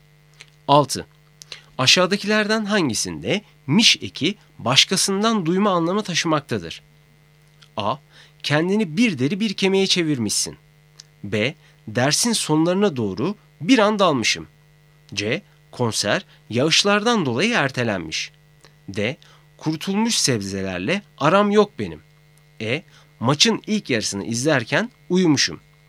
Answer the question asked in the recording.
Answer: Doğru cevap C. Konser yağışlardan dolayı ertelenmiş.